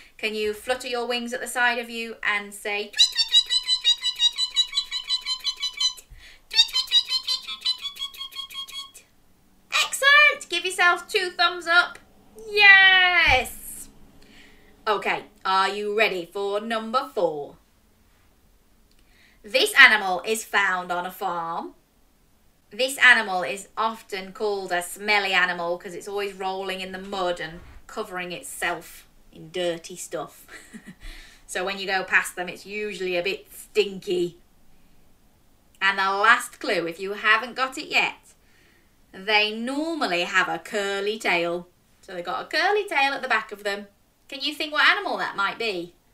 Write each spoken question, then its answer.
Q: Can you think what animal that might be?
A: It's a pig.